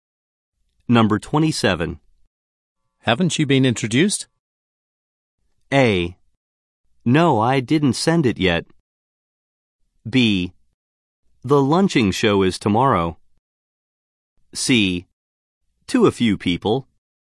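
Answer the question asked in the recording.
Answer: C: To a few people.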